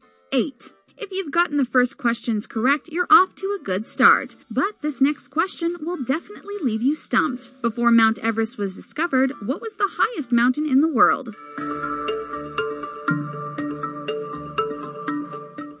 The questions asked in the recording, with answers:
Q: Before Mount Everest was discovered, what was the highest mountain in the world?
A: the correct answer is Mount Everest.